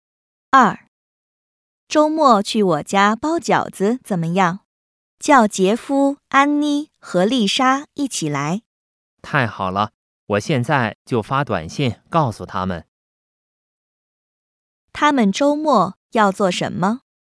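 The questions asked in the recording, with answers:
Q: 他们周末要做什么?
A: 去我家包饺子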